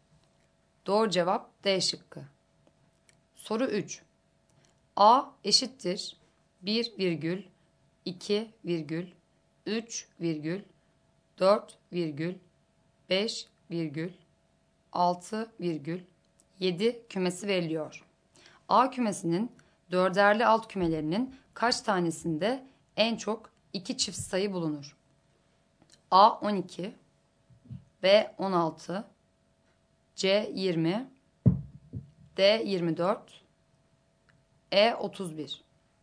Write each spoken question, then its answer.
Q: A kümesinin dörderli alt kümelerinin kaç tanesinde en çok 2 çift sayı bulunur?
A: Doğru cevap E şıkkı.